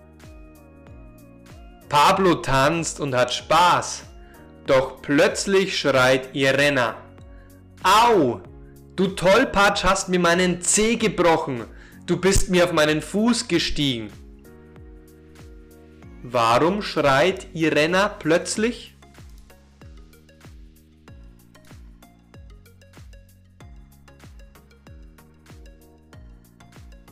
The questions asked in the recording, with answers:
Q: Warum schreit Irena plötzlich?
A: weil ihr Pablo auf den Fuß gestiegen ist und ihr den Zeh gebrochen hat.